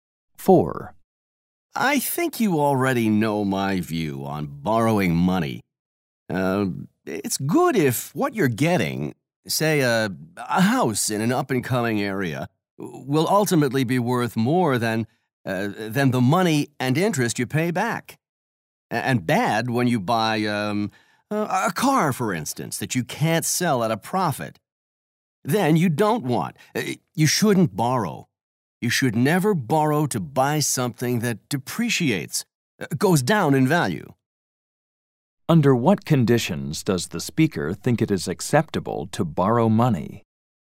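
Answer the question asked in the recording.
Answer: When what you buy will be worth more than the money and interest you pay back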